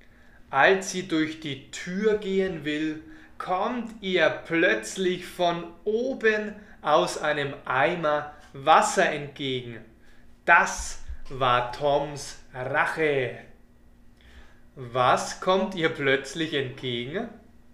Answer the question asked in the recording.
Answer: Wasser. Ihr kommt plötzlich Wasser entgegen.